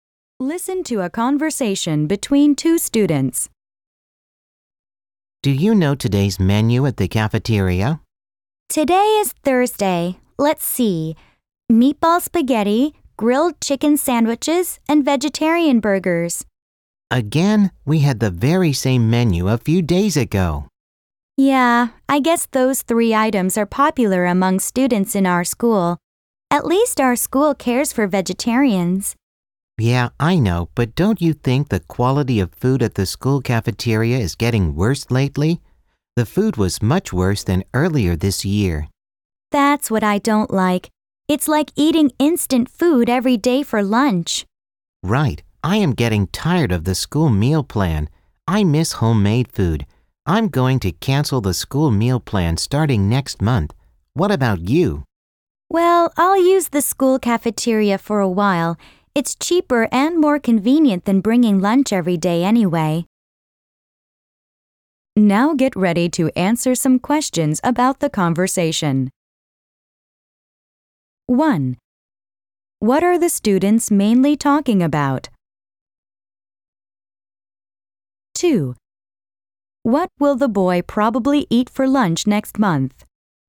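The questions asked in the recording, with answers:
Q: What are the students mainly talking about?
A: The school cafeteria food and meal plan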